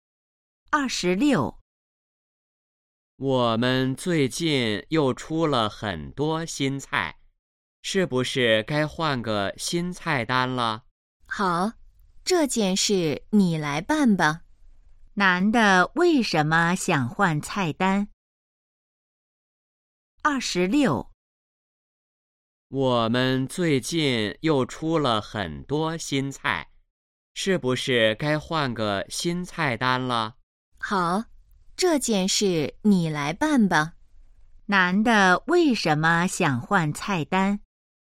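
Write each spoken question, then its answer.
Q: 男的为什么想换菜单?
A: 出了很多新菜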